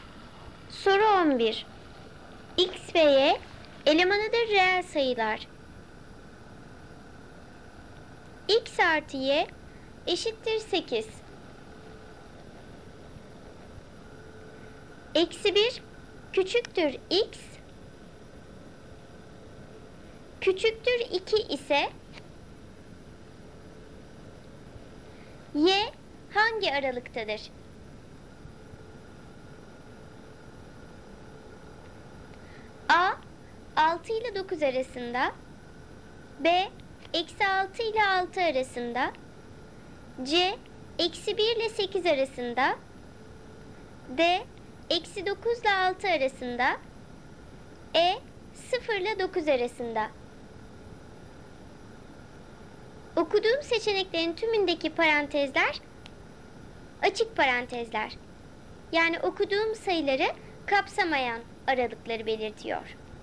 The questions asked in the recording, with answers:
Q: Y hangi aralıktadır?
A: Doğru cevap A. 6 ile 9 arasında.